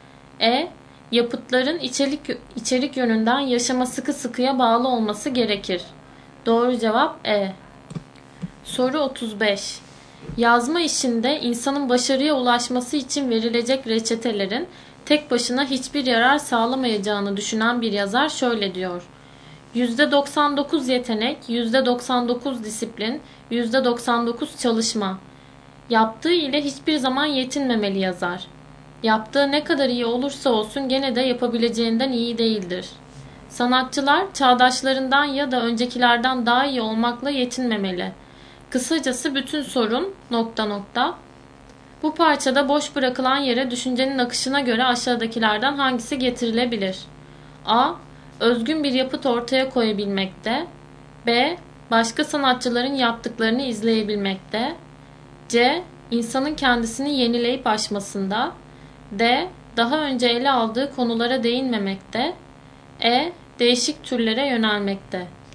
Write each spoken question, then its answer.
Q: Bu parçada boş bırakılan yere düşüncenin akışına göre aşağıdakilerden hangisi getirilebilir?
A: Doğru cevap C.